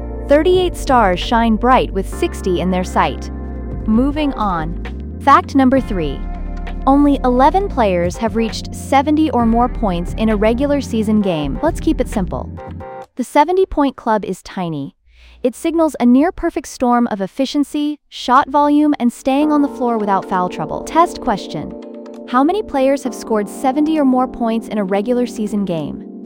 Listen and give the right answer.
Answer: Correct answer, 11.